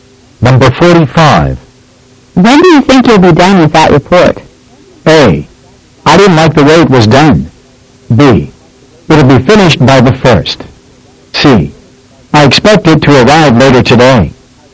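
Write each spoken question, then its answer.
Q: When do you think you'll be done with that report?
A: B: It'll be finished by the 1st.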